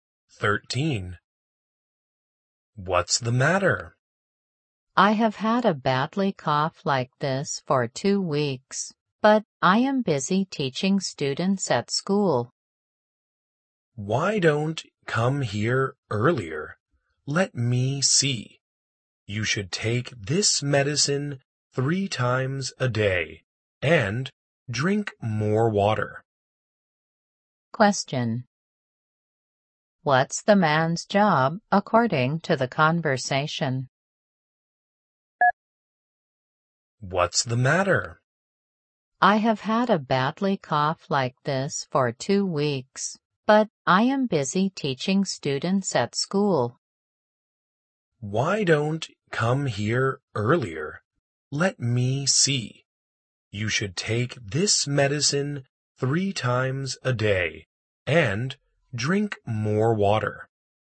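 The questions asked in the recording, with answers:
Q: What's the man's job according to the conversation?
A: A teacher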